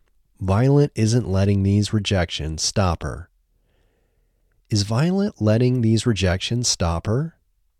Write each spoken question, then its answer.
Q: Is Violet letting these rejections stop her?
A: No, Violet isn't letting these rejections stop her.